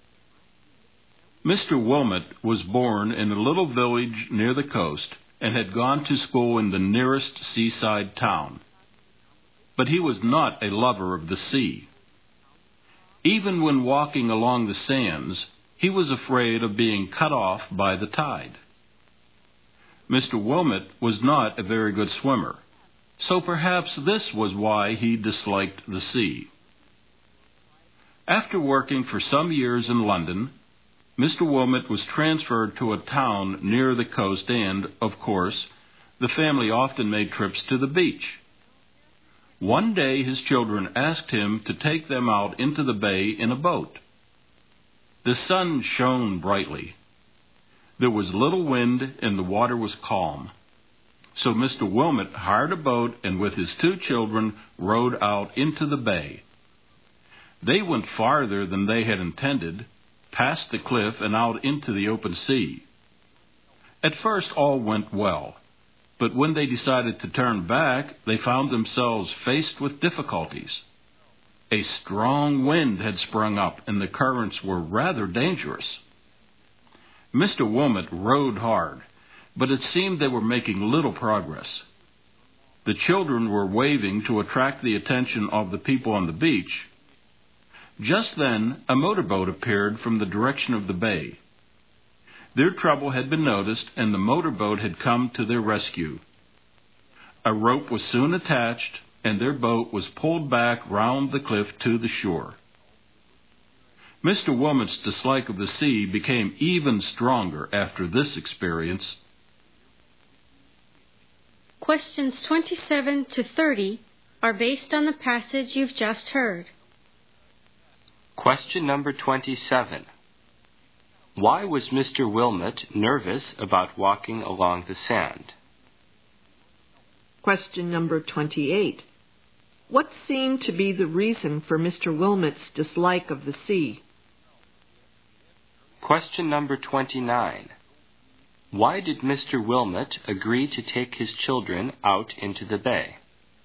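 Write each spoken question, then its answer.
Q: Wilmot nervous about walking along the sand?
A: He was afraid of being cut off by the tide

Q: Wilmot's dislike of the sea?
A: He was not a very good swimmer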